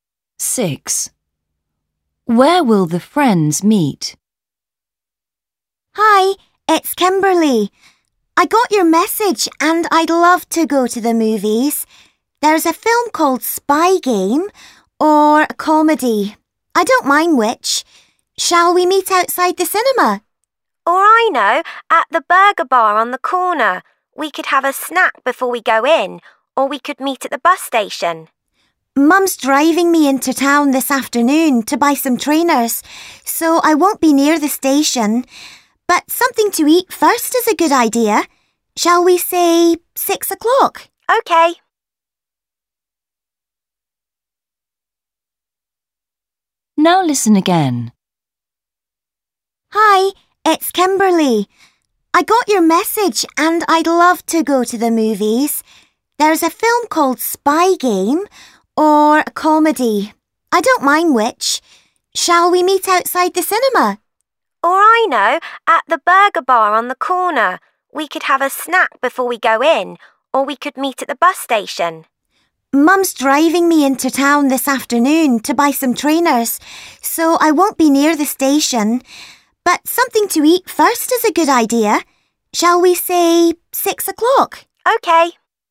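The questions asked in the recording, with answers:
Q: Where will the friends meet?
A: At the burger bar on the corner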